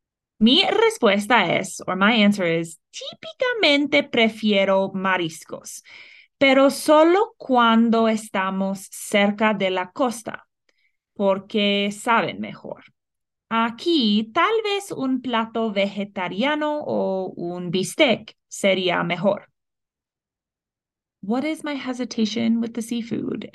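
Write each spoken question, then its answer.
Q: What is my hesitation with the seafood?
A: It only tastes better near the coast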